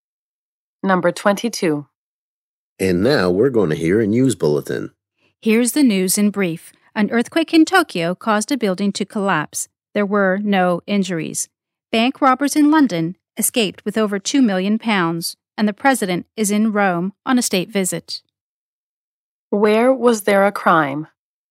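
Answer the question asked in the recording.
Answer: London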